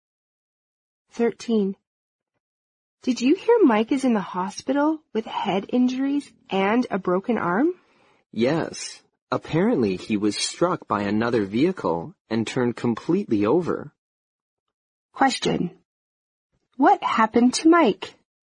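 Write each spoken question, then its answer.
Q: What happened to Mike?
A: He was injured in a car accident.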